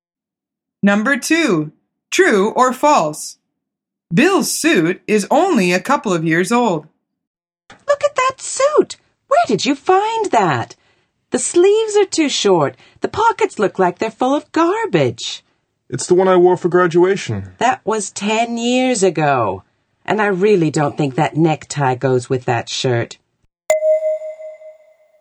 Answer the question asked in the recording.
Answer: The answer is false.